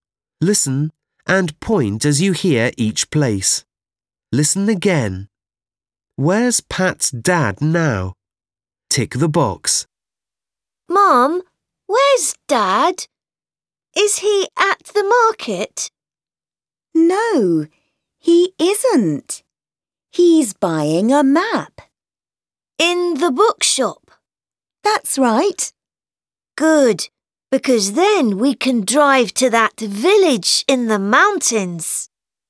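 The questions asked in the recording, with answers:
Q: Where's Pat's dad now?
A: In the bookshop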